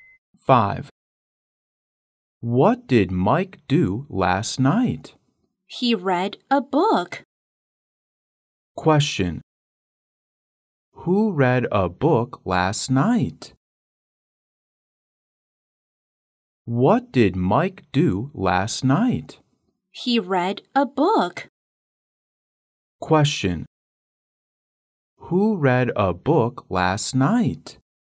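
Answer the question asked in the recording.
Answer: Mike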